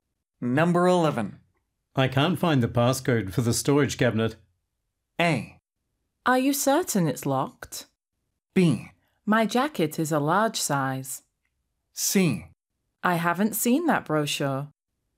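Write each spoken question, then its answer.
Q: I can't find the passcode for the storage cabinet.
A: A: Are you certain it's locked?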